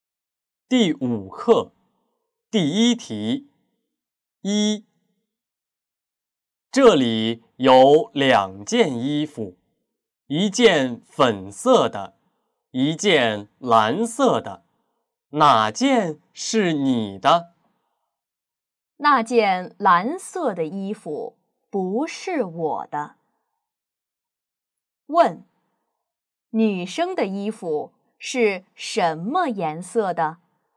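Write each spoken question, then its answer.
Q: 女生的衣服是什么颜色的?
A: 粉色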